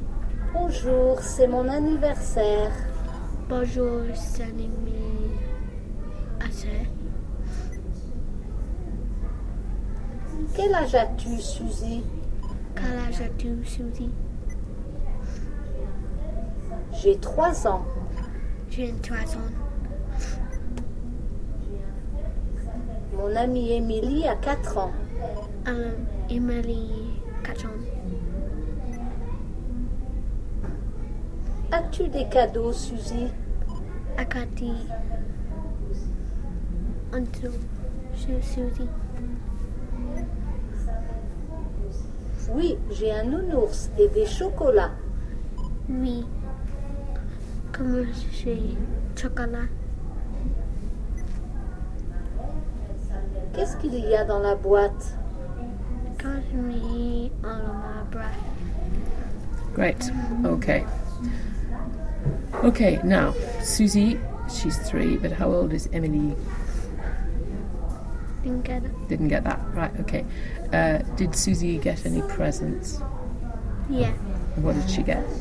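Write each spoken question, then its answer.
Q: Did Susie get any presents?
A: Yeah.

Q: What did she get?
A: A teddy bear and chocolates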